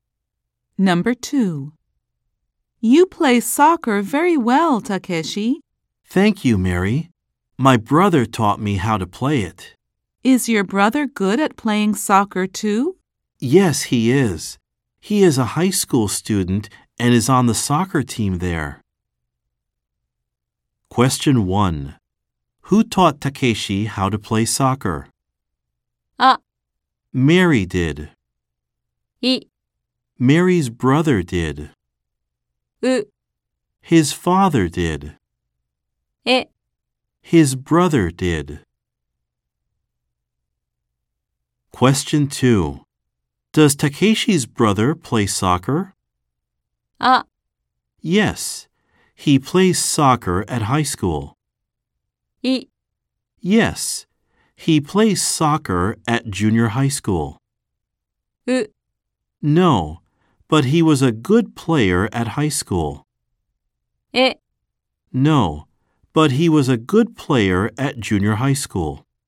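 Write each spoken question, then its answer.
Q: Who taught Takeshi how to play soccer?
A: え: His brother did.

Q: Does Takeshi's brother play soccer?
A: あ: Yes, he plays soccer at high school.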